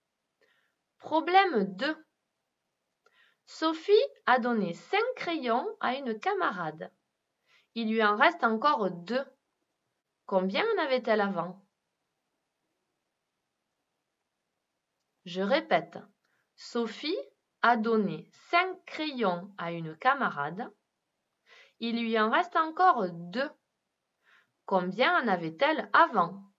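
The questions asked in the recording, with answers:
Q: Combien en avait-elle avant?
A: 7 crayons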